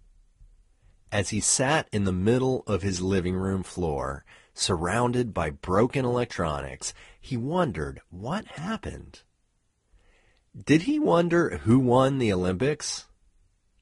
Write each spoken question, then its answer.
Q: Did he wonder who won the Olympics?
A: No, he didn't wonder who won the Olympics.